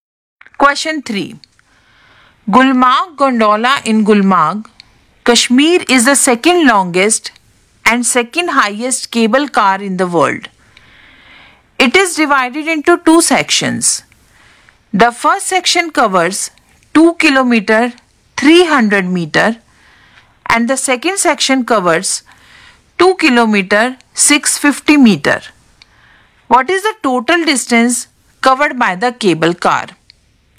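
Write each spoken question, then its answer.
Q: What is the total distance covered by the cable car?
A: 4 km 950 meter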